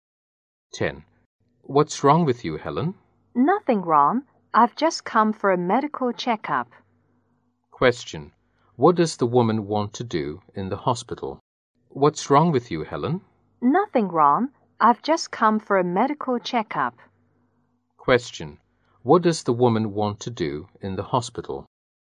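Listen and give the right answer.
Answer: Have a medical checkup.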